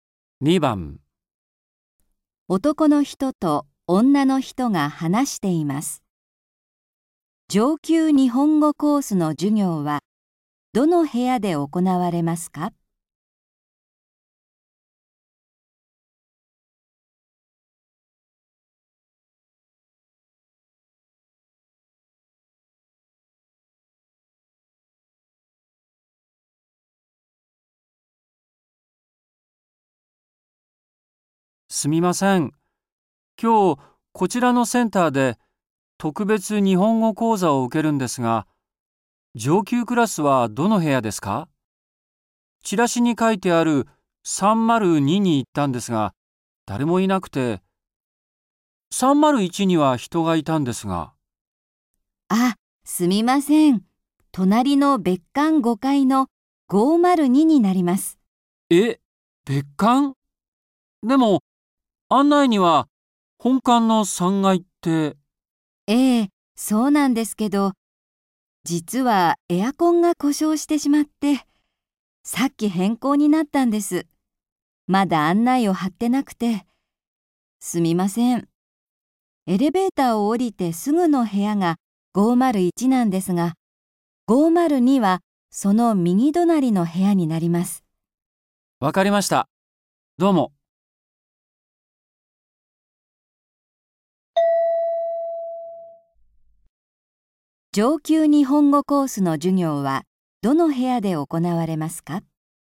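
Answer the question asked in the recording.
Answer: 別館5階の502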